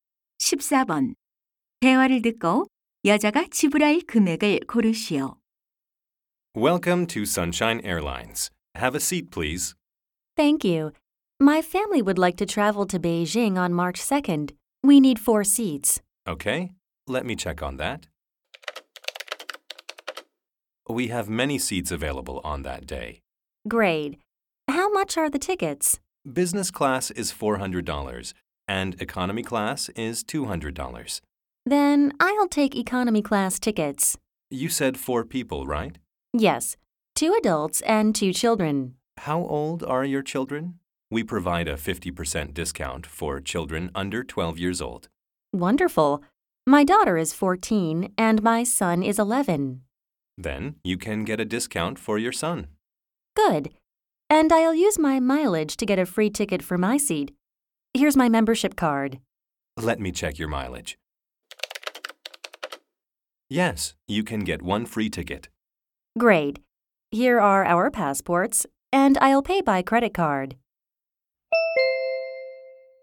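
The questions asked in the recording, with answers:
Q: 대화를 듣고 여자가 지불할 금액을 고르시오.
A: 500달러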